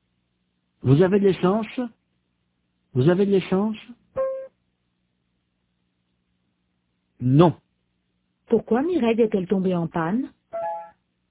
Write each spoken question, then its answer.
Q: Pourquoi Mireille est-elle tombée en panne ?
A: Parce qu'elle n'avait plus d'essence.